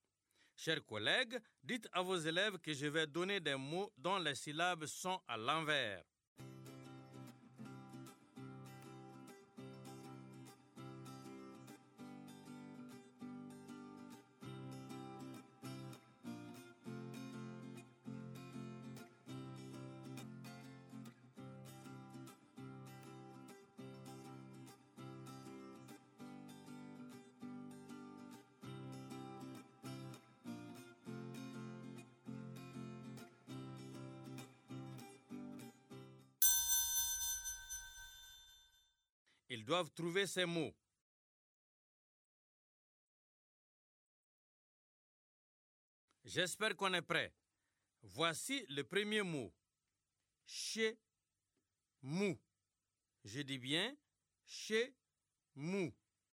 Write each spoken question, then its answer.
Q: Chez mou. Je dis bien chez mou.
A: C'est mouche.